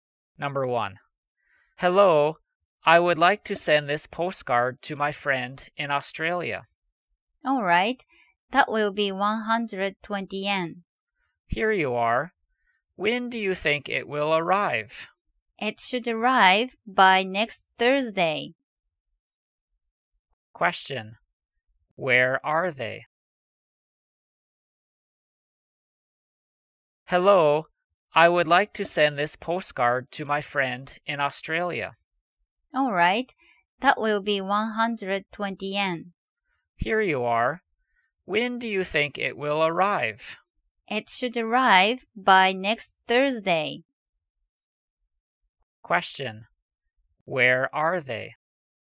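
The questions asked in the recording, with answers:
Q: Where are they?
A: At a post office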